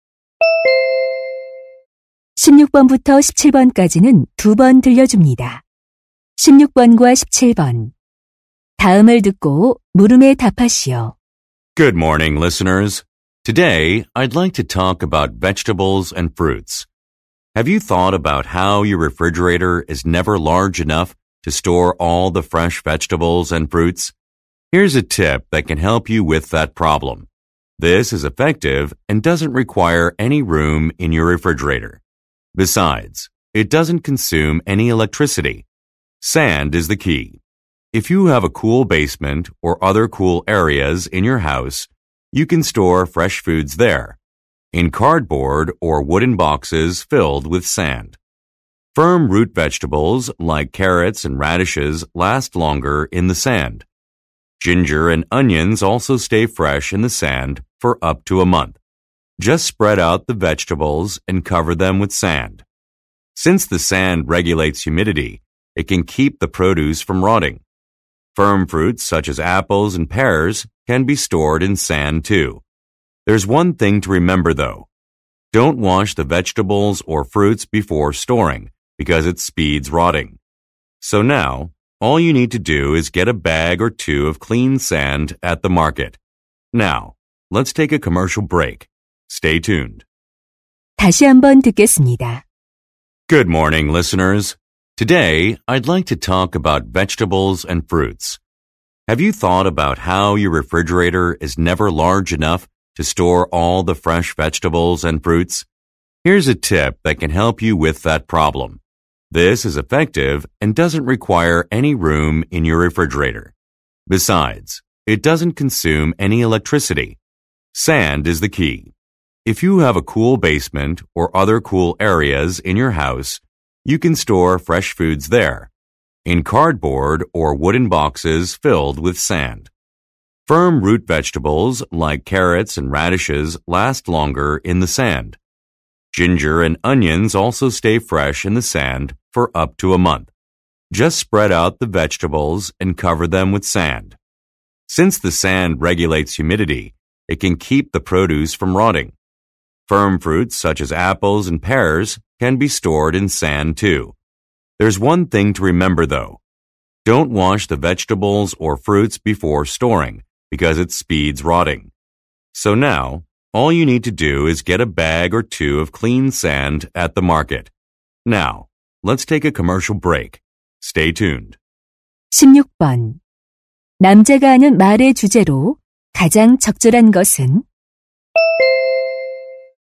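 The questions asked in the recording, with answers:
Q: 남자가 하는 말의 주제로 가장 적절한 것은?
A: 모래를 이용해 채소와 과일을 신선하게 보관하는 방법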